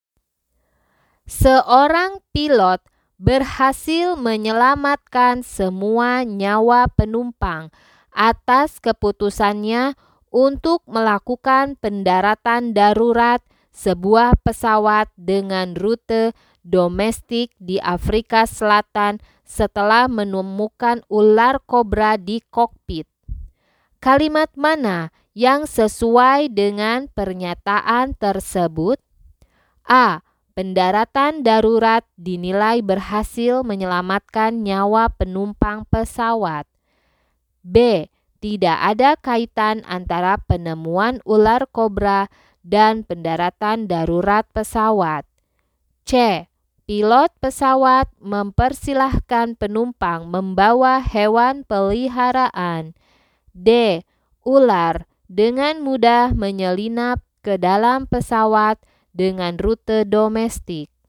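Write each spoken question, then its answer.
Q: Kalimat mana yang sesuai dengan pernyataan tersebut?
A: A: Pendaratan darurat dinilai berhasil menyelamatkan nyawa penumpang pesawat.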